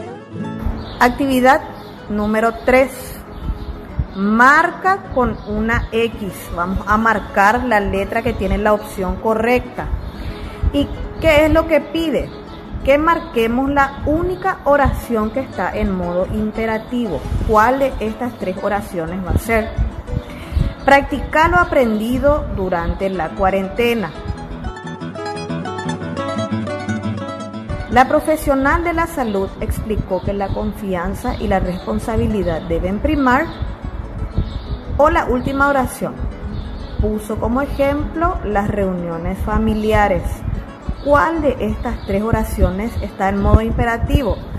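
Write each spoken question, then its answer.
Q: ¿Cuál de estas 3 oraciones está en modo imperativo?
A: Practica lo aprendido durante la cuarentena.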